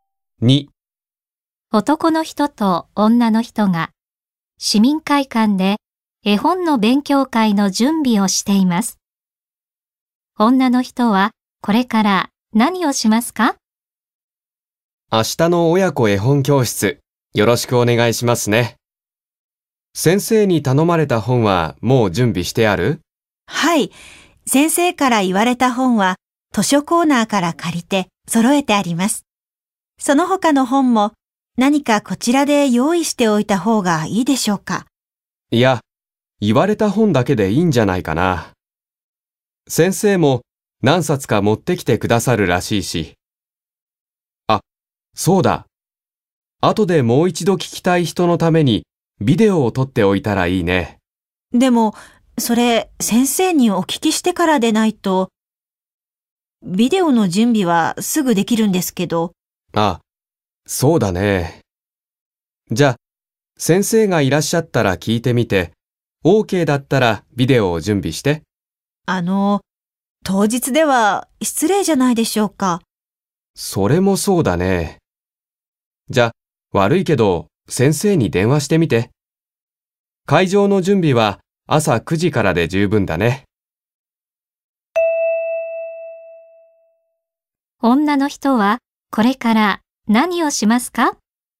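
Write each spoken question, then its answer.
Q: 女の人はこれから何をしますか?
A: 先生に電話してビデオを撮ってもいいか聞く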